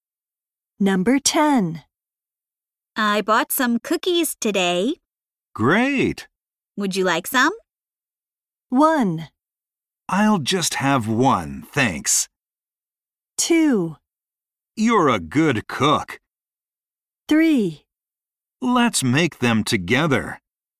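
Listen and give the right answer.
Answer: 1: I'll just have 1, thanks.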